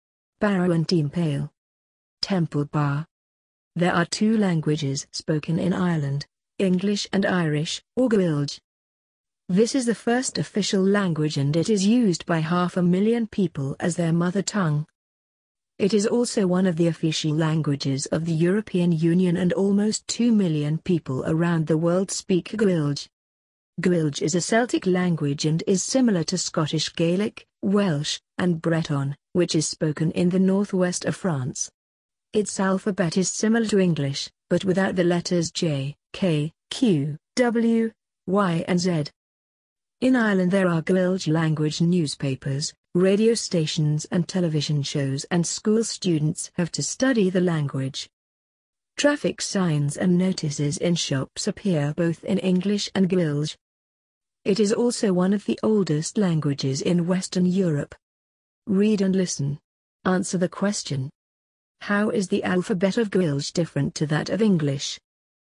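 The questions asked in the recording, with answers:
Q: How is the alphabet of Gaeilge different to that of English?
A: It doesn't have the letters J, K, Q, W, Y and Z.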